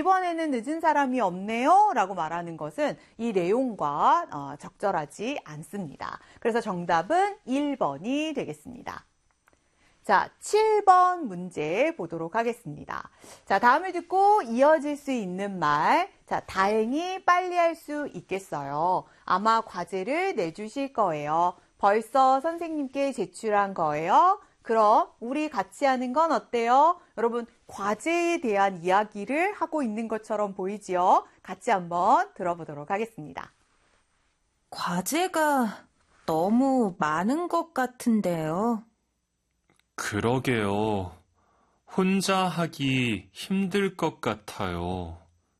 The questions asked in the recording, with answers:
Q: 자, 다음을 듣고 이어질 수 있는 말.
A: 자, 그래서 이 7번의 정답은 4번이 되겠습니다.